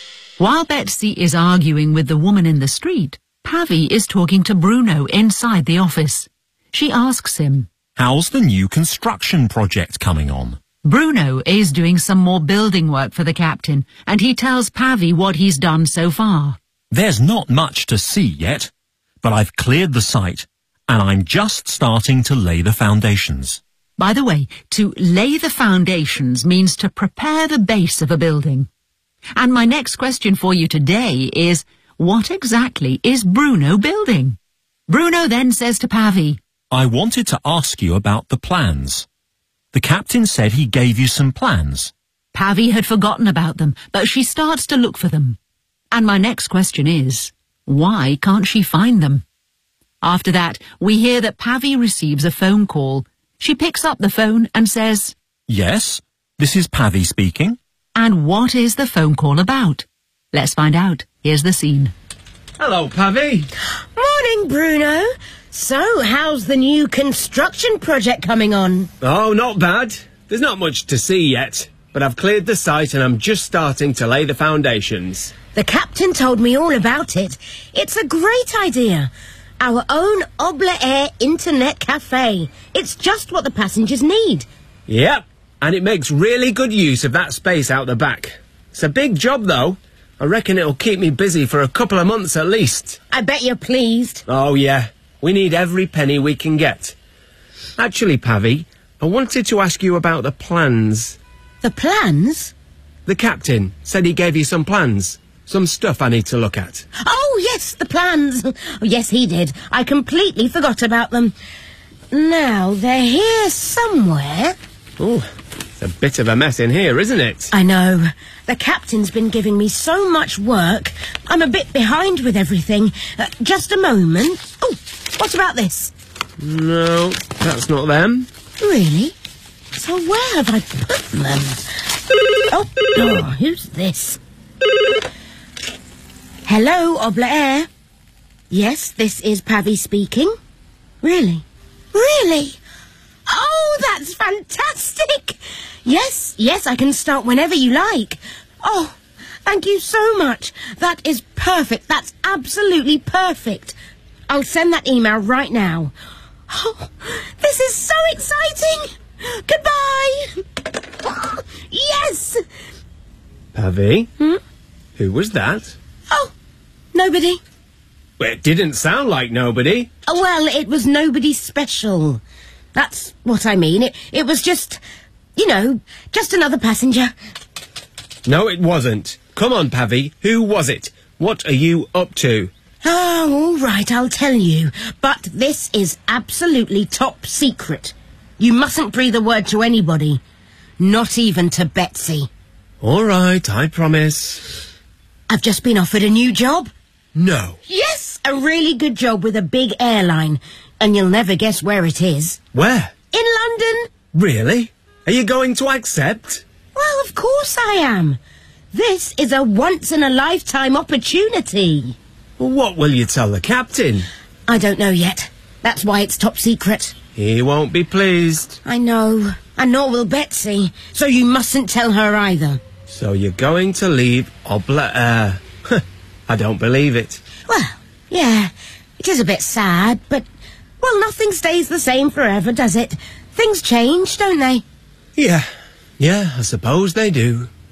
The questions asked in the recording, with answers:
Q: what exactly is Bruno building?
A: An internet cafe.

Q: why can't she find them?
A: it's a bit of a mess in here, isn't it?

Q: And what is the phone call about?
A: I've just been offered a new job.